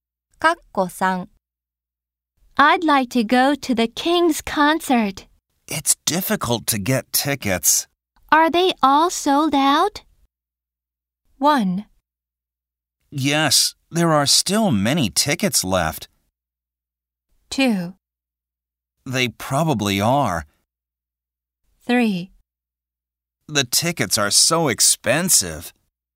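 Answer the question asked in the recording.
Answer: 2: They probably are.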